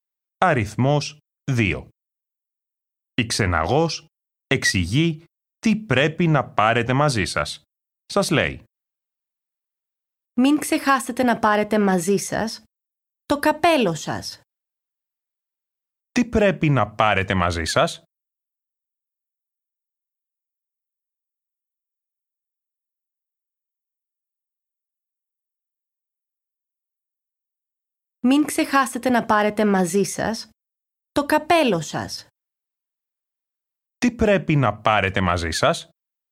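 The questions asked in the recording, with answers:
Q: Τι πρέπει να πάρετε μαζί σας?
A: το καπέλο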